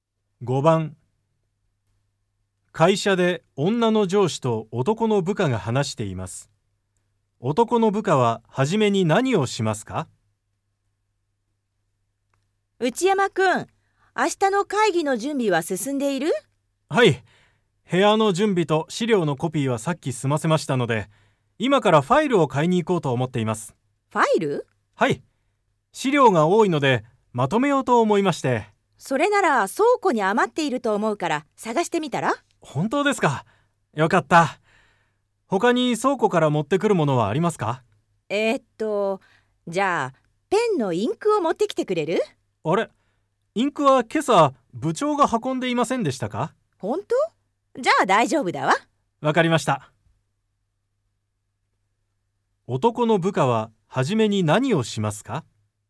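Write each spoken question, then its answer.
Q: 男の部下は初めに何をしますか?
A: 倉庫でファイルを探す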